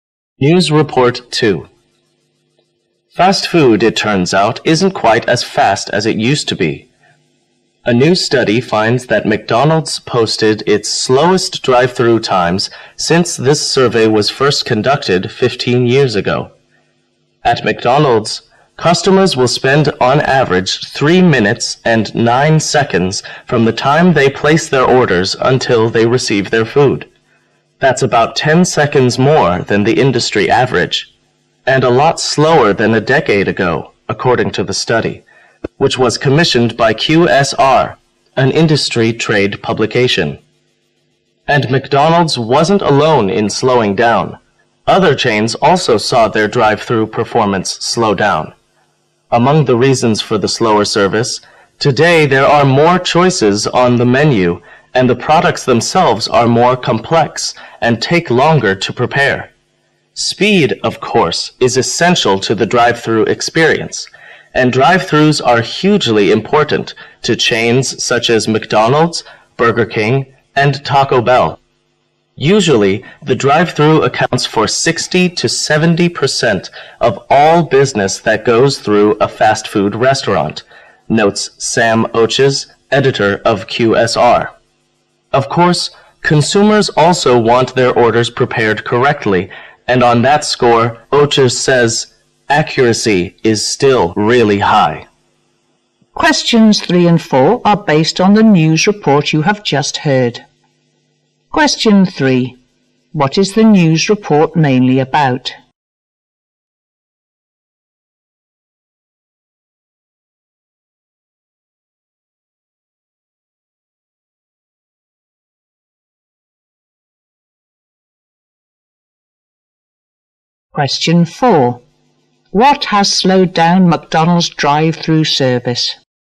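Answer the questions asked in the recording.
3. Fast food drive-through service has become slower, with McDonald's slowest in 15 years
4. More menu choices and more complex products that take longer to prepare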